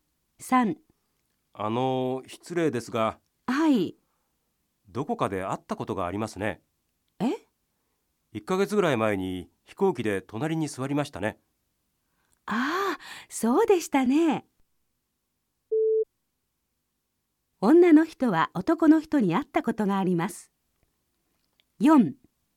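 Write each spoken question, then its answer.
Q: 女の人は男の人に会ったことがあります。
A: 正しい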